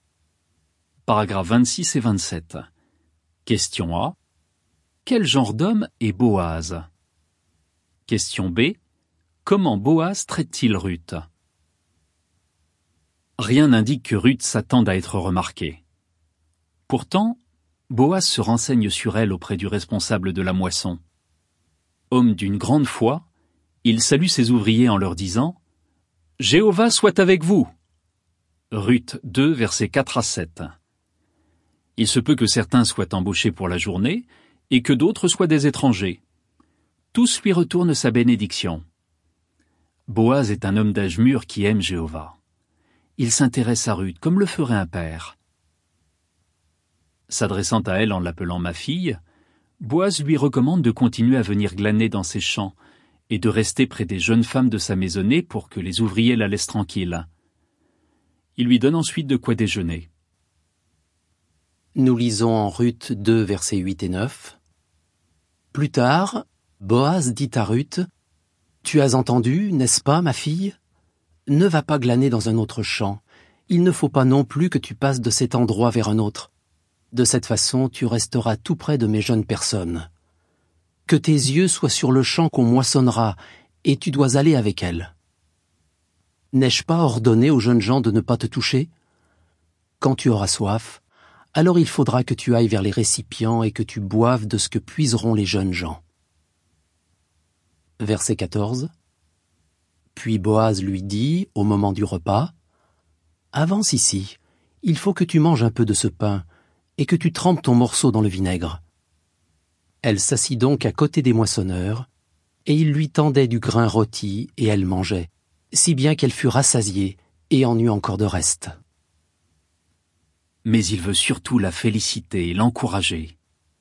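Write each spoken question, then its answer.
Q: Quel genre d'homme est Boaz?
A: Un homme d'âge mûr, d'une grande foi, qui aime Jéhovah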